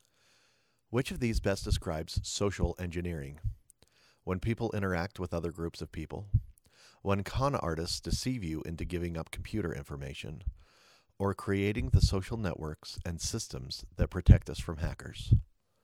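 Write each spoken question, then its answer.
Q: Which of these best describes social engineering?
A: B: When con artists deceive you into giving up computer information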